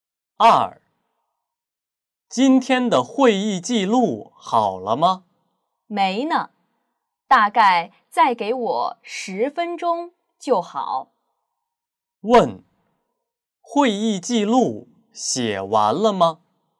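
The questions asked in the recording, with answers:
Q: 会议记录写完了吗?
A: 还没有,大概还要10分钟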